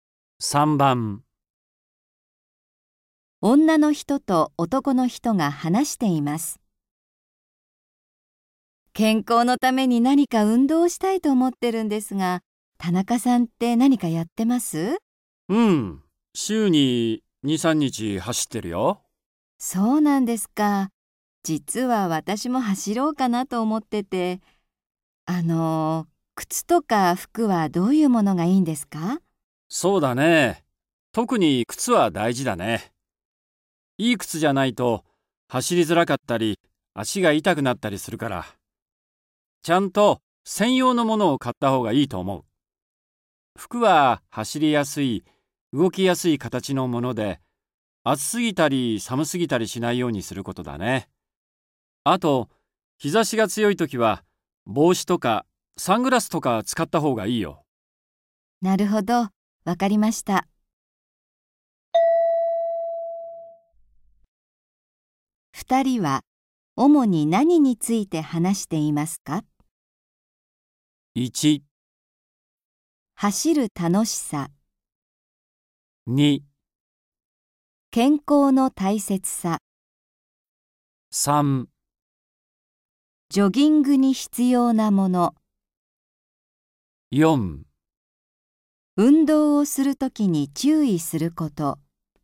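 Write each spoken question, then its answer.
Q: 二人は主に何について話していますか?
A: 3: ジョギングに必要なもの。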